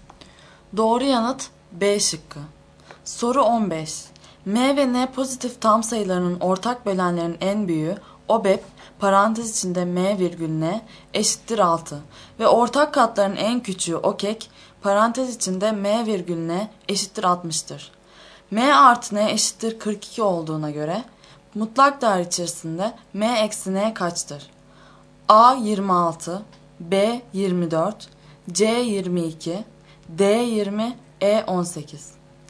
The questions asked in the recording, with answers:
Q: M artı N eşittir 42 olduğuna göre mutlak değer içerisinde M eksi N kaçtır?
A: Doğru yanıt E şıkkı.